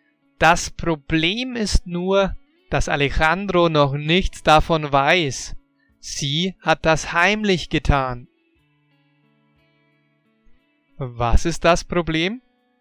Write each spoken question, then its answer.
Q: Was ist das Problem?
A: Das Problem ist, dass Alejandro noch nichts davon weiß.